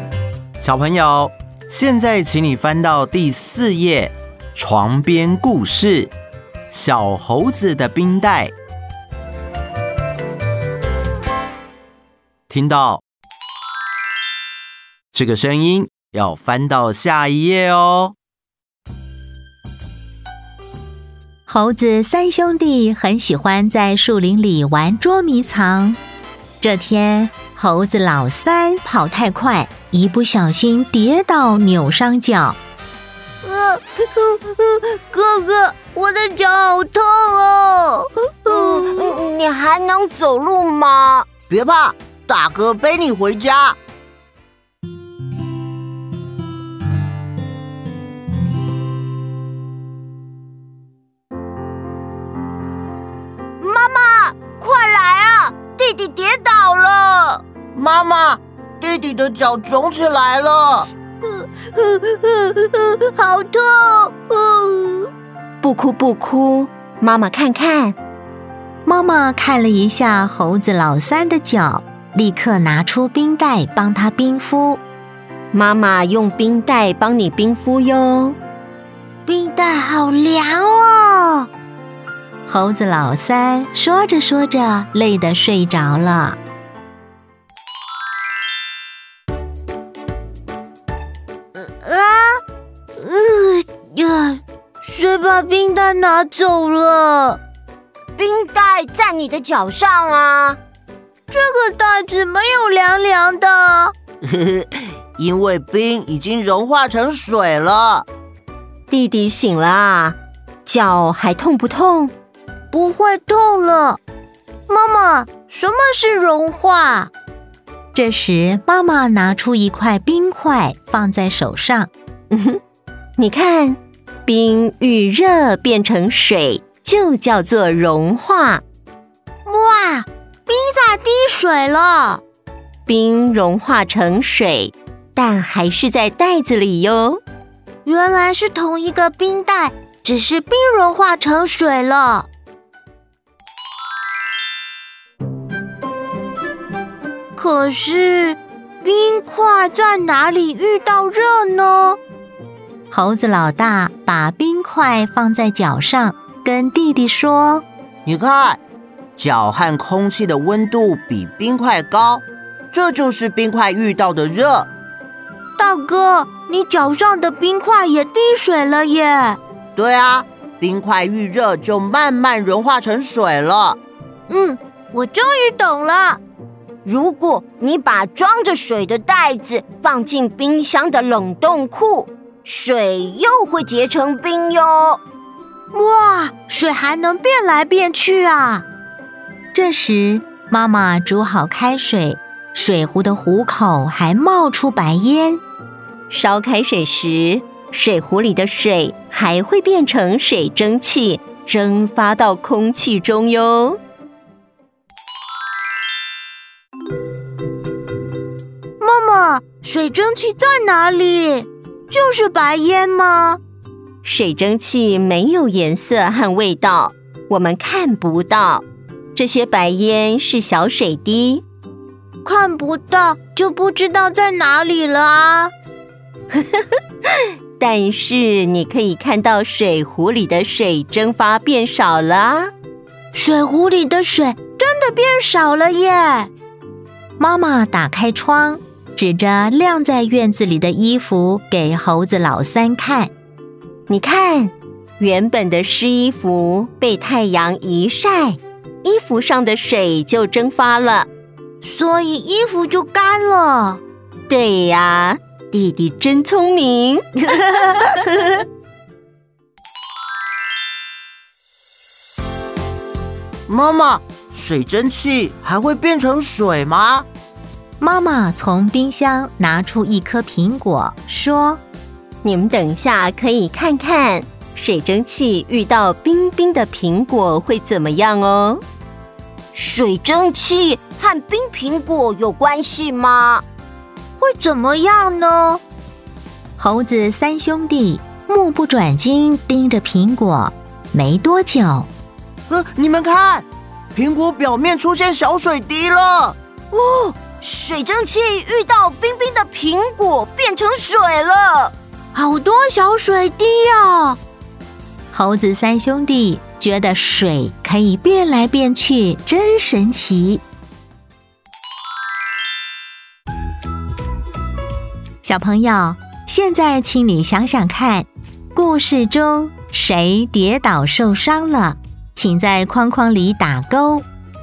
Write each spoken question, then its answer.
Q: 小朋友,现在请你想想看,故事中谁跌倒受伤了,请在框框里打勾。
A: 猴子老三,